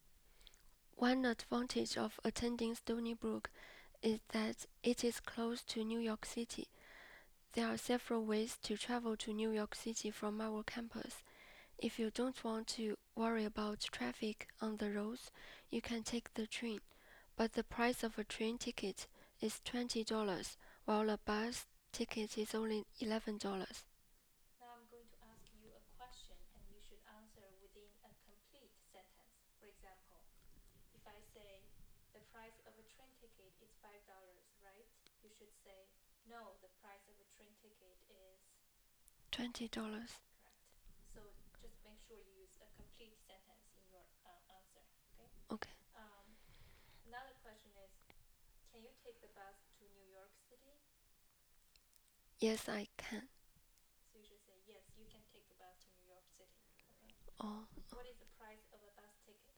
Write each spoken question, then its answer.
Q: What is the price of a bus ticket?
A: The bus ticket to New York City is $11.